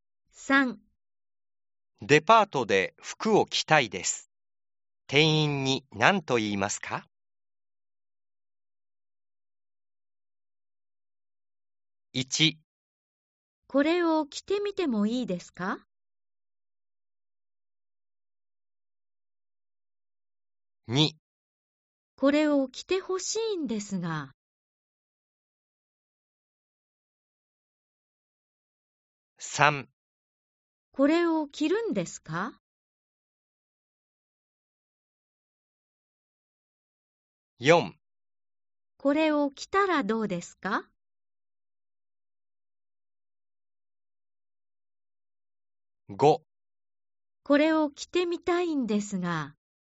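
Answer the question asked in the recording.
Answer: ○: 1 これを着てみてもいいですか?/ 5 これを着てみたいんですが。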